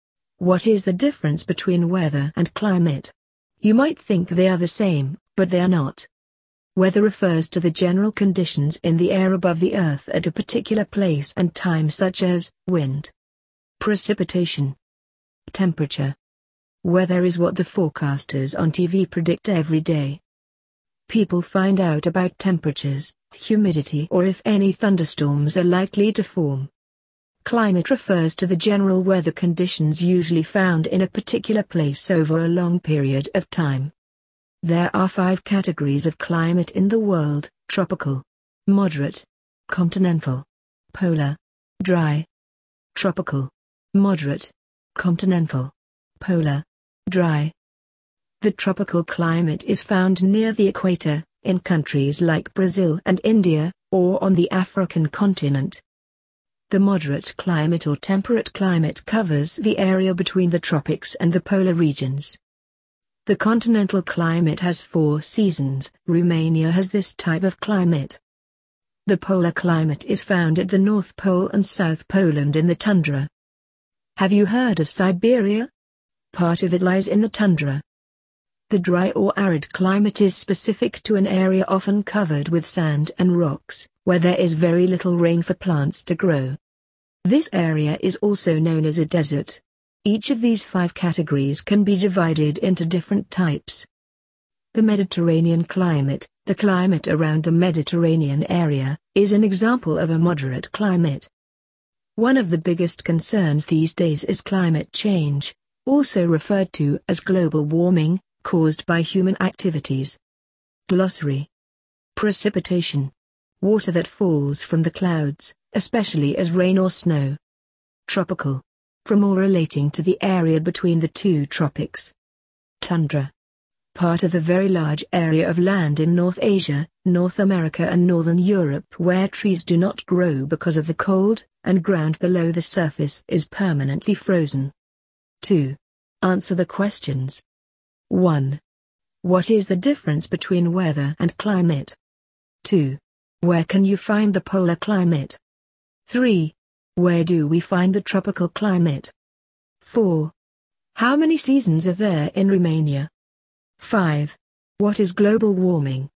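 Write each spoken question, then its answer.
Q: What is the difference between weather and climate?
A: Weather is the conditions at a particular place and time; climate is the general weather conditions in a place over a long period

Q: Where can you find the polar climate?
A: At the North Pole and South Pole, in the tundra

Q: Where do we find the tropical climate?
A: Near the equator, in countries like Brazil and India, or in Africa

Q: How many seasons are there in Romania?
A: Four

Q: What is global warming?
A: Climate change caused by human activities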